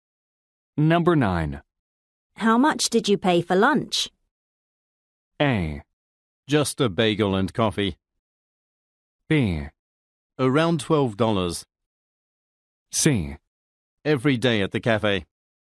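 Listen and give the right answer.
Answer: B: Around $12.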